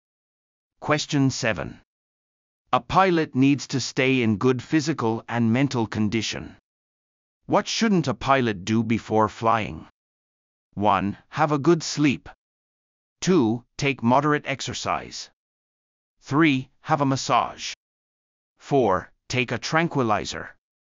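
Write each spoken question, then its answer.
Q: What shouldn't a pilot do before flying?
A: 4: Take a tranquilizer.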